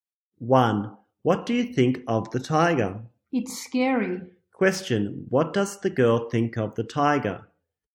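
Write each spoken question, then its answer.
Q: Question: What does the girl think of the tiger?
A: It's scary.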